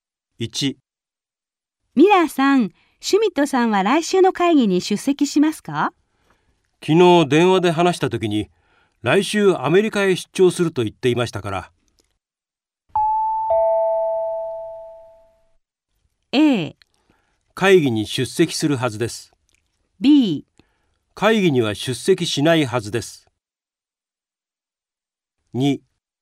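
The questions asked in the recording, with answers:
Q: ミラーさん、シュミットさんは来週の会議に出席しますか?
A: B: 会議には出席しないはずです。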